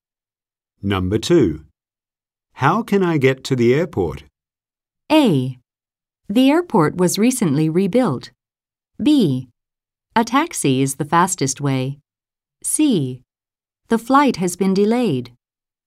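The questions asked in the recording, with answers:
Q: How can I get to the airport?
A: B: A taxi is the fastest way.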